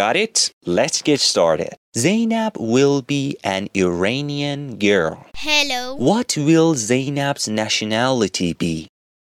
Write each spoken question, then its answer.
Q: What will Zainab's nationality be?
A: Her nationality will be Iranian.